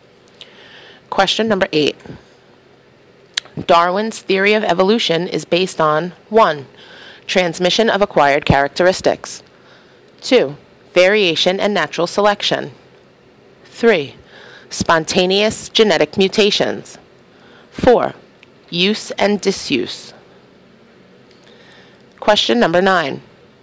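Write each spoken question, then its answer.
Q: Darwin's theory of evolution is based on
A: 2: Variation and natural selection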